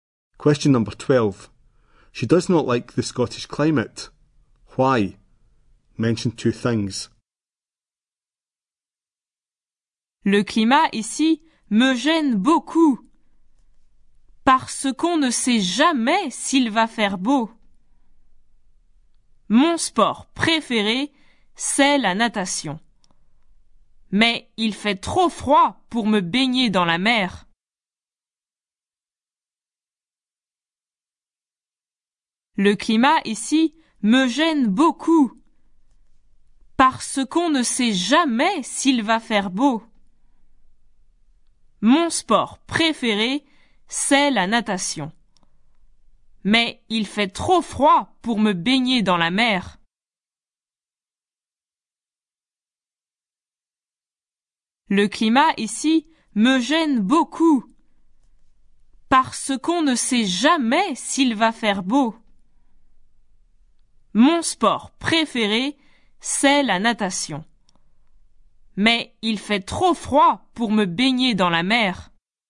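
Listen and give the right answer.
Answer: You never know if it will be nice; too cold to swim in the sea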